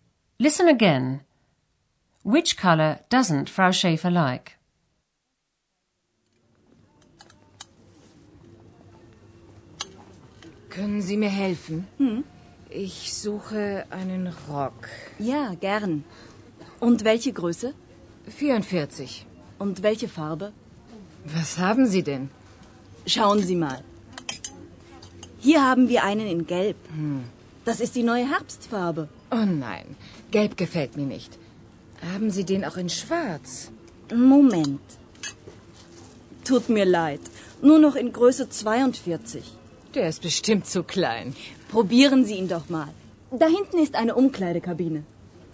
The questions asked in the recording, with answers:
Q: Which color doesn't Frau Schäfer like?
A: Frau Schäfer doesn't like yellow.